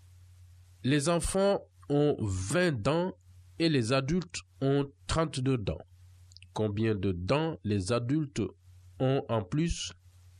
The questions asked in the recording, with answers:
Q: Combien de dents les adultes ont en plus?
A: X est égal à 12.